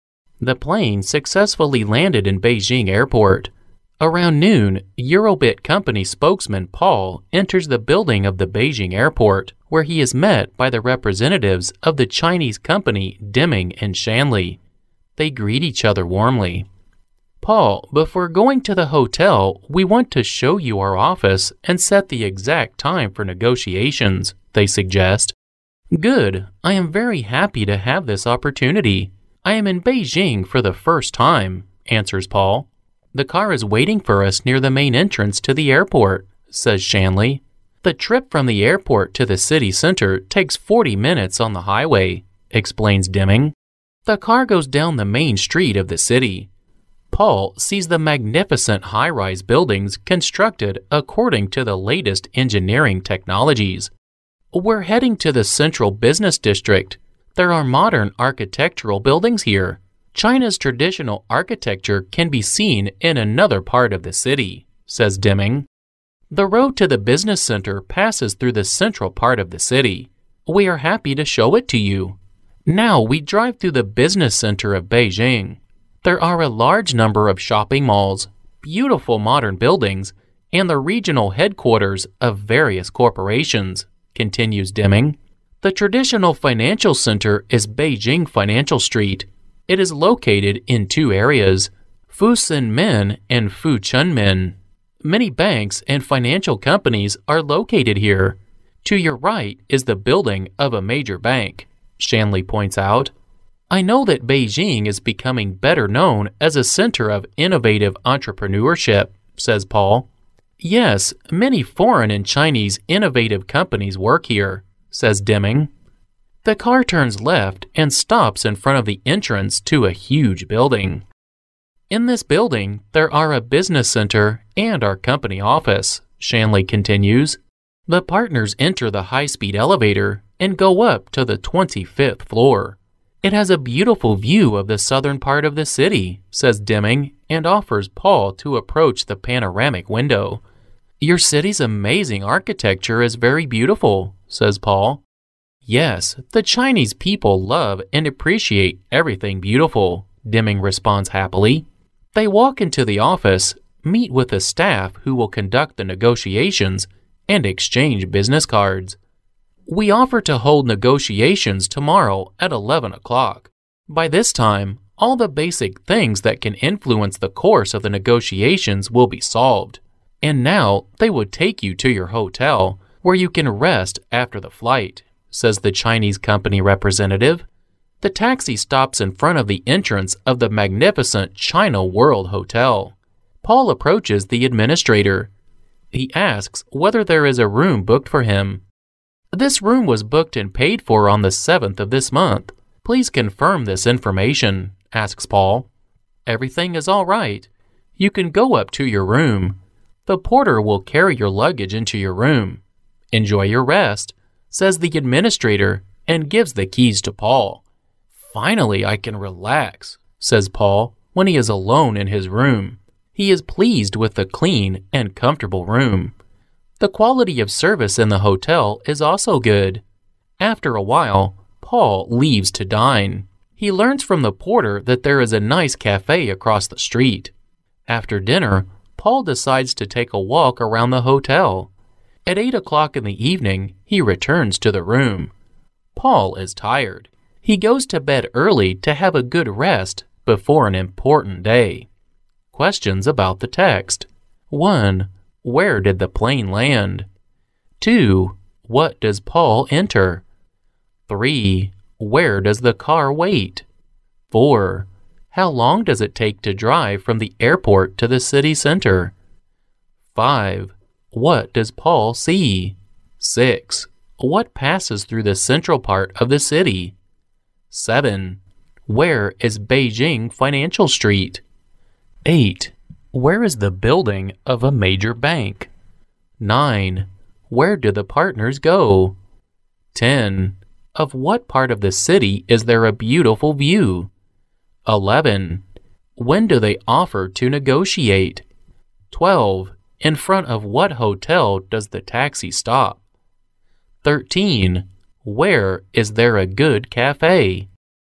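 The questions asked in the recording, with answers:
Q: Where did the plane land?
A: In Beijing Airport

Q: What does Paul enter?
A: The building of the Beijing Airport

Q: Where does the car wait?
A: Near the main entrance to the airport

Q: How long does it take to drive from the airport to the city center?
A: 40 minutes

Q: What does Paul see?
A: Magnificent high-rise buildings

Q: What passes through the central part of the city?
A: The road to the business center

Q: Where is Beijing Financial Street?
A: In two areas, Fusunmen and Fuchunmen

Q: Where is the building of a major bank?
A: To Paul's right

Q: Where do the partners go?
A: Up to the 25th floor

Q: Of what part of the city is there a beautiful view?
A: The southern part

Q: When do they offer to negotiate?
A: Tomorrow at 11 o'clock

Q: In front of what hotel does the taxi stop?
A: China World Hotel

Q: Where is there a good cafe?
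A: Across the street from the hotel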